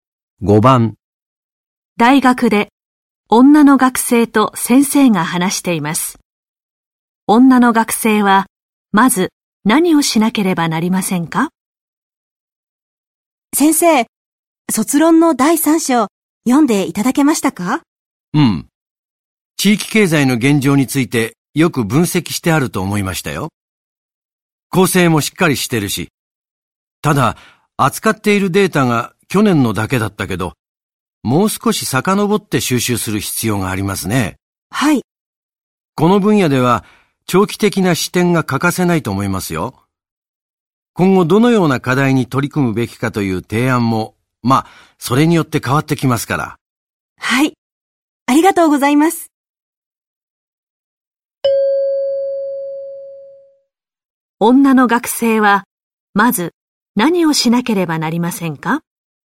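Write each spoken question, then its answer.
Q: 女の学生は、まず何をしなければなりませんか?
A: もっと前のデータを集める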